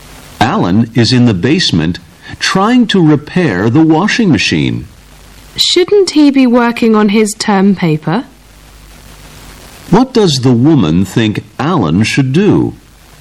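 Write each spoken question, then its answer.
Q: What does the woman think Alan should do?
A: Work on his term paper.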